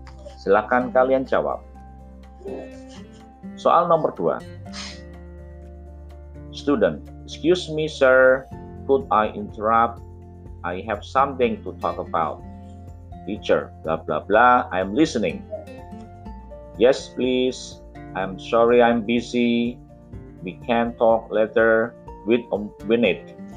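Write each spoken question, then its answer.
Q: Student, excuse me sir, could I interrupt? I have something to talk about. Teacher, blah blah blah, I am listening. Yes please, I'm sorry I'm busy. We can talk later with Winnet.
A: Yes please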